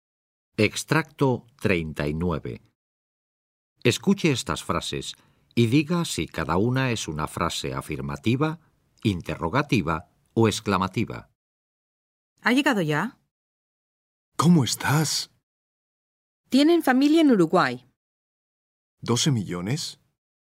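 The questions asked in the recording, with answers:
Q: ¿Ha llegado ya?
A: interrogativa

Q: ¿Cómo estás?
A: interrogativa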